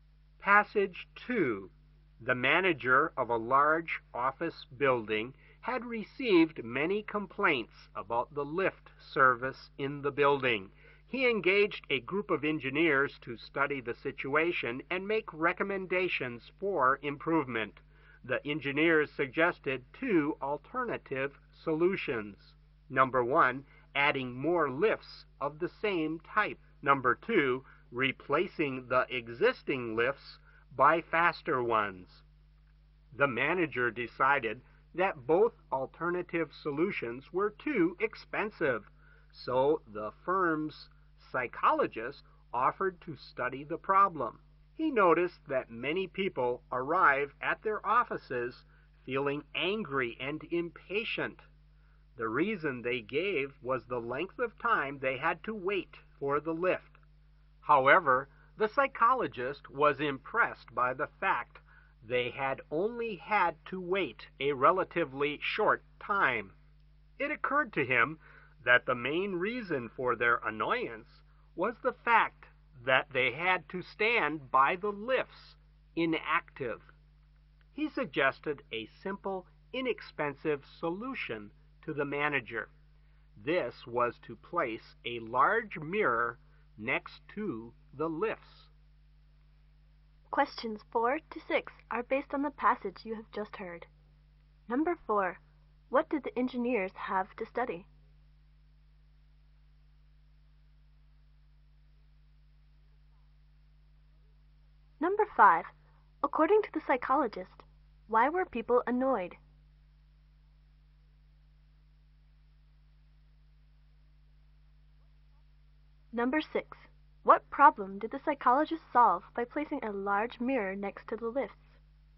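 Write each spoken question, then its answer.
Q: What did the engineers have to study?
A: The lift service in the building.

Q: According to the psychologist, why were people annoyed?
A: They had to stand by the lifts doing nothing.

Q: What problem did the psychologist solve by placing a large mirror next to the lifts?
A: People's impatience and annoyance while waiting for the lifts.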